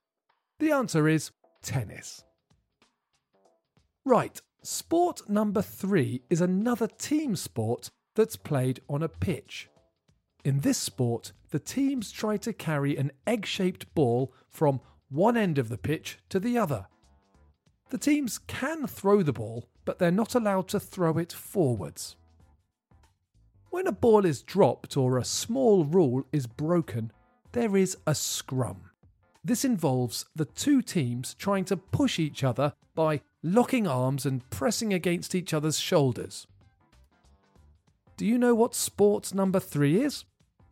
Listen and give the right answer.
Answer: The answer is rugby.